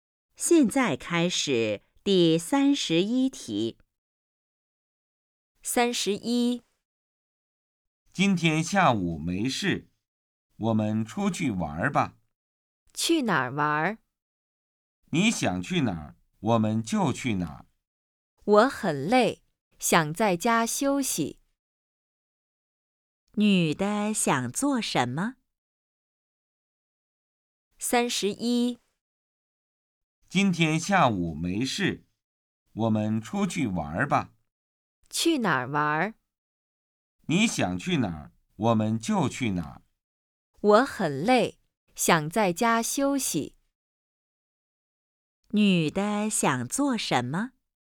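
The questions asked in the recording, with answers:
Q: 女的想做什么?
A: 在家休息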